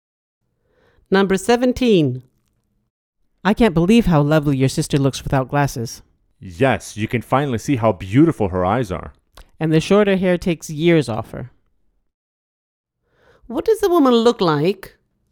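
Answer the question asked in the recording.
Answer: no glasses and shorter hair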